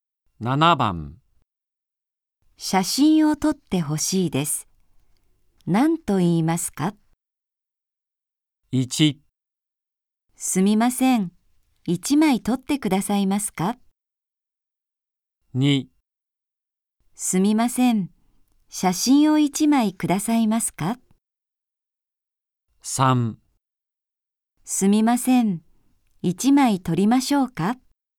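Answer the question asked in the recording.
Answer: 1: すみません。1枚撮ってくださいますか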